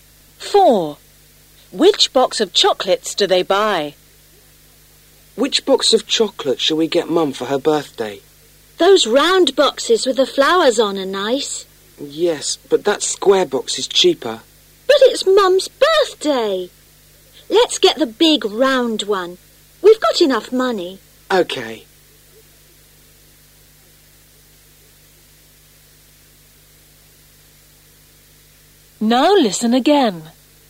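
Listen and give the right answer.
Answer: The big round one with flowers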